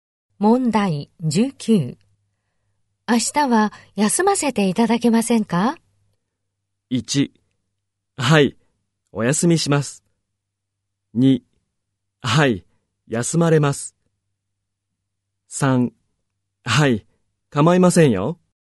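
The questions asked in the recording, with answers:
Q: 明日は休ませていただけませんか?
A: 2: はい、構いませんよ。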